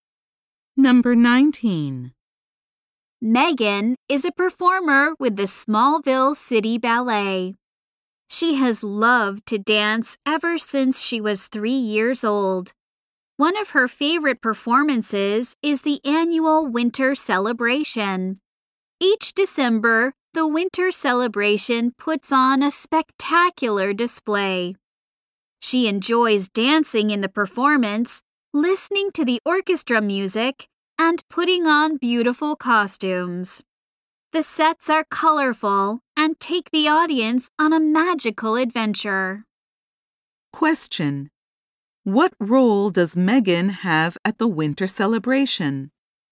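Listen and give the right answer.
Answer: She is a dancer (ballet performer).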